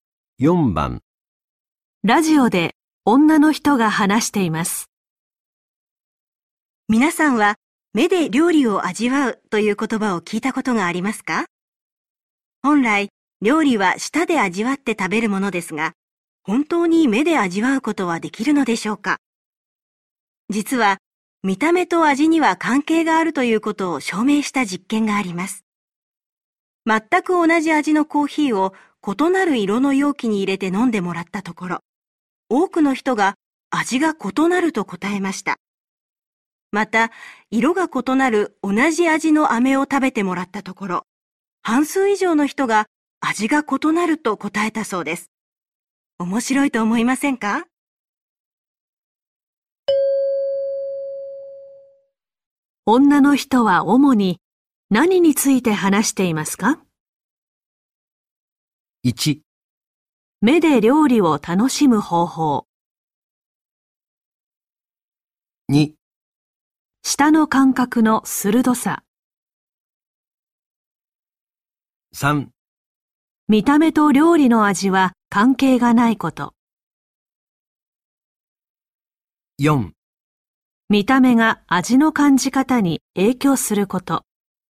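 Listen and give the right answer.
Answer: 4: 見た目が味の感じ方に影響すること。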